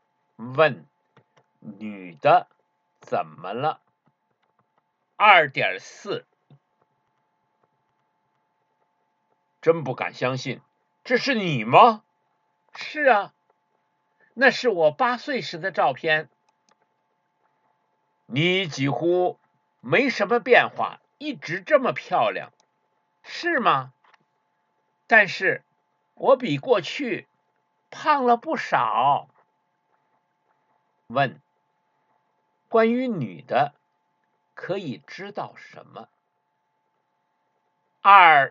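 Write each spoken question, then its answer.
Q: 关于女的可以知道什么?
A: 比过去胖了不少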